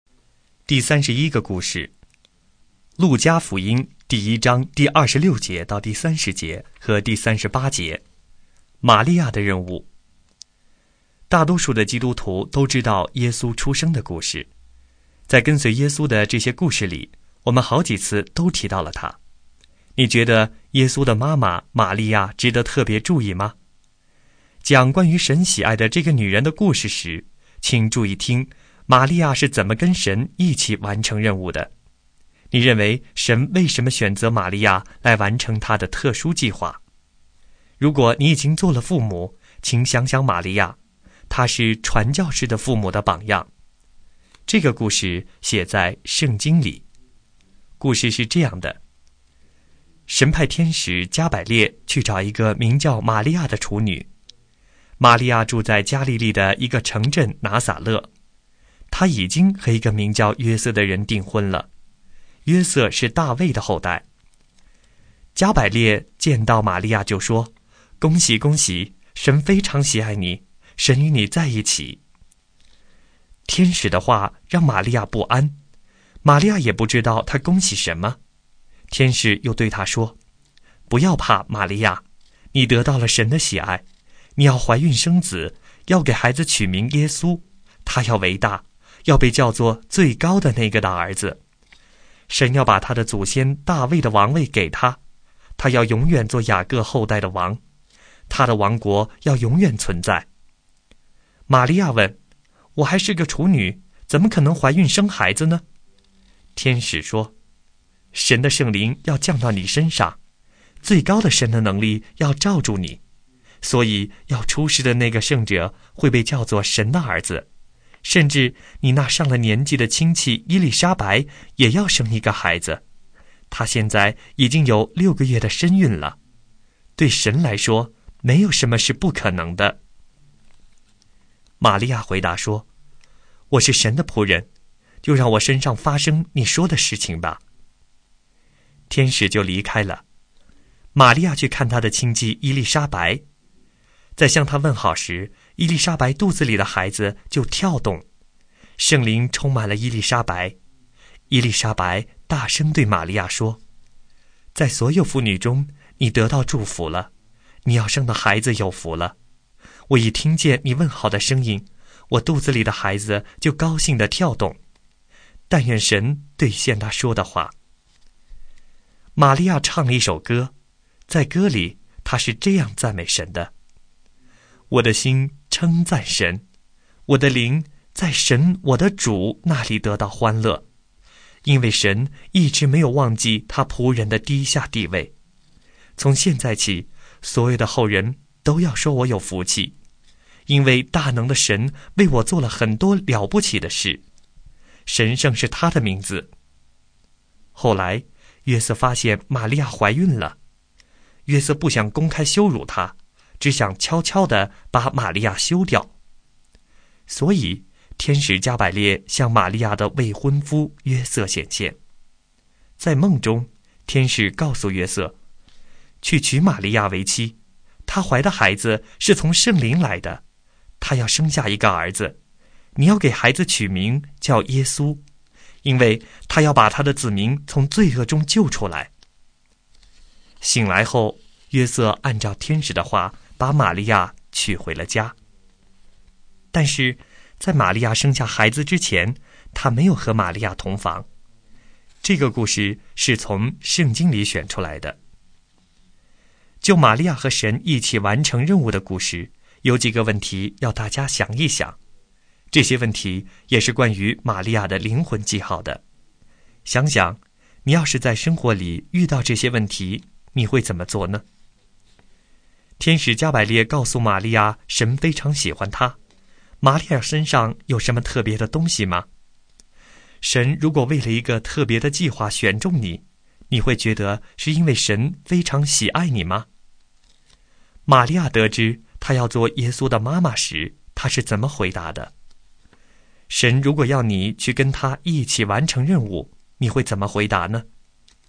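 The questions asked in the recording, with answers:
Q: 玛利亚得知她要做耶稣的妈妈时,她是怎么回答的?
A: 我是神的仆人,就让我身上发生你说的事情吧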